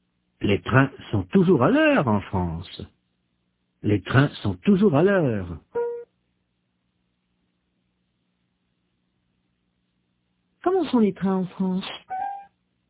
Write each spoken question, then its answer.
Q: Comment sont les trains en France ?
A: Toujours à l'heure, très ponctuel.